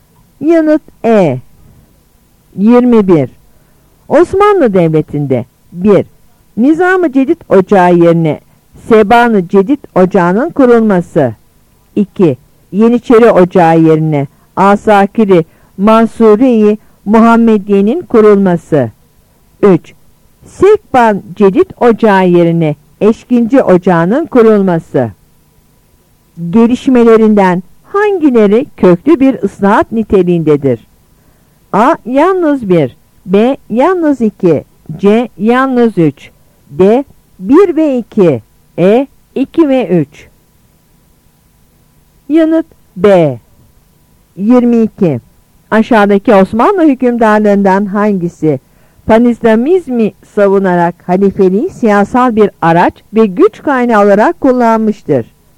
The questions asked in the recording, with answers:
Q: Gelişmelerinden hangileri köklü bir ıslahat niteliğindedir?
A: Yanıt B.